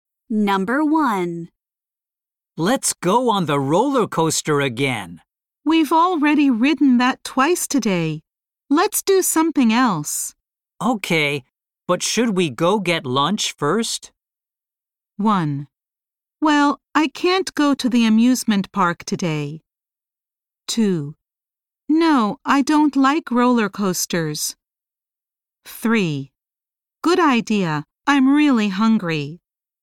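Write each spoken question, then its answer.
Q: Okay, but should we go get lunch first?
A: 3: Good idea. I'm really hungry.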